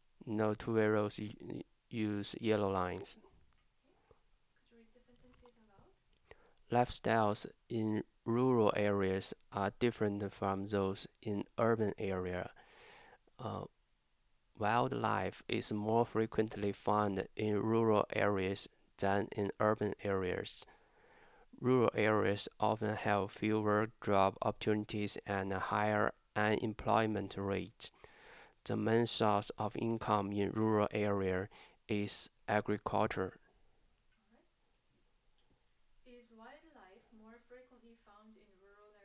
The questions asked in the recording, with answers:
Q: Is wildlife more frequently found in rural areas?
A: Yeah, the wildlife usually find at rural area.